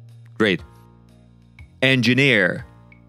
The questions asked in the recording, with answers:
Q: Engineer.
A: An engineer, right.